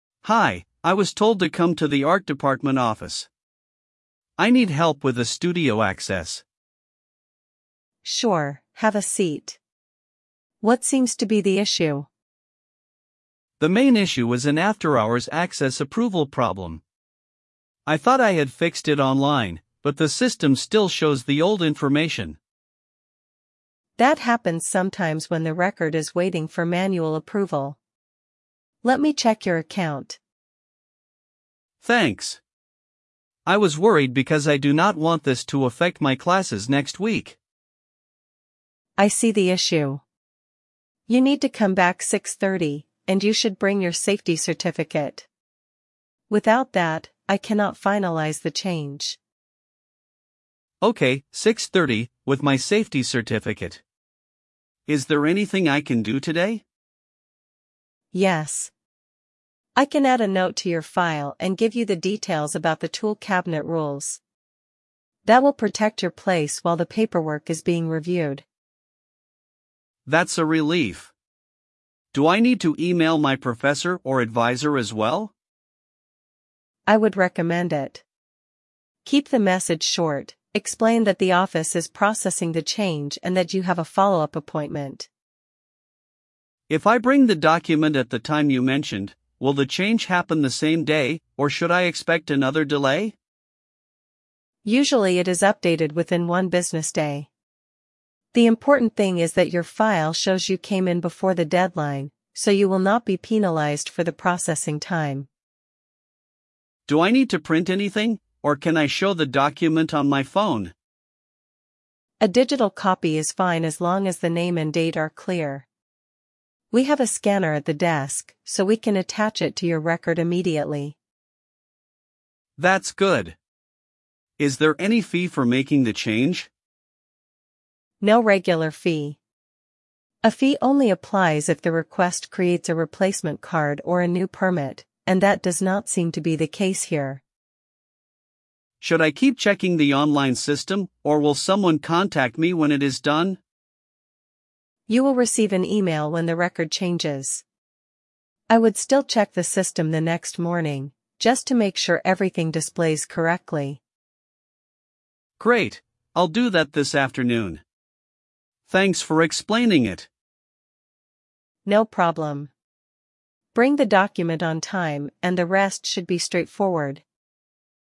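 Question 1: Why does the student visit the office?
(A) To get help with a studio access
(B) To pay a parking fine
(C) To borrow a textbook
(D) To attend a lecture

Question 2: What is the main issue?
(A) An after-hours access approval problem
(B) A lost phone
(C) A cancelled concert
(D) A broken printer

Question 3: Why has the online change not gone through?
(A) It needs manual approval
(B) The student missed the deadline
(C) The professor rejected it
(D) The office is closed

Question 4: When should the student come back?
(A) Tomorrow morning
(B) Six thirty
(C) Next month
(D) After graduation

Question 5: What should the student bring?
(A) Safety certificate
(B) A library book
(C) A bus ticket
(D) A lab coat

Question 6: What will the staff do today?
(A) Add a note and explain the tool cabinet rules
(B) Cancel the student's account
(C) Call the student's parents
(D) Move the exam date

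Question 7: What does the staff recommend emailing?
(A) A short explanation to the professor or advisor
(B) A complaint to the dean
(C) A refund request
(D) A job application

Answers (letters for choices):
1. A
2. A
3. A
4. B
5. A
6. A
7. A

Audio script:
Student: Hi, I was told to come to the art department office. I need help with a studio access.
Staff: Sure, have a seat. What seems to be the issue?
Student: The main issue is an after-hours access approval problem. I thought I had fixed it online, but the system still shows the old information.
Staff: That happens sometimes when the record is waiting for manual approval. Let me check your account.
Student: Thanks. I was worried because I do not want this to affect my classes next week.
Staff: I see the issue. You need to come back six thirty, and you should bring your safety certificate. Without that, I cannot finalise the change.
Student: Okay, six thirty, with my safety certificate. 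Is there anything I can do today?
Staff: Yes. I can add a note to your file and give you the details about the tool cabinet rules. That will protect your place while the paperwork is being reviewed.
Student: That's a relief. Do I need to email my professor or advisor as well?
Staff: I would recommend it. Keep the message short: explain that the office is processing the change and that you have a follow-up appointment.
Student: If I bring the document at the time you mentioned, will the change happen the same day, or should I expect another delay?
Staff: Usually it is updated within one business day. The important thing is that your file shows you came in before the deadline, so you will not be penalised for the processing time.
Student: Do I need to print anything, or can I show the document on my phone?
Staff: A digital copy is fine as long as the name and date are clear. We have a scanner at the desk, so we can attach it to your record immediately.
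Student: That's good. Is there any fee for making the change?
Staff: No regular fee. A fee only applies if the request creates a replacement card or a new permit, and that does not seem to be the case here.
Student: Should I keep checking the online system, or will someone contact me when it is done?
Staff: You will receive an email when the record changes. I would still check the system the next morning, just to make sure everything displays correctly.
Student: Great, I'll do that this afternoon. Thanks for explaining it.
Staff: No problem. Bring the document on time, and the rest should be straightforward.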